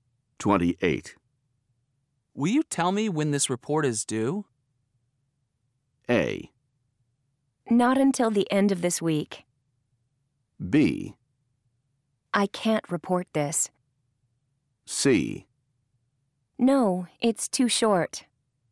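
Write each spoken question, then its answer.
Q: Will you tell me when this report is due?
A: A: Not until the end of this week.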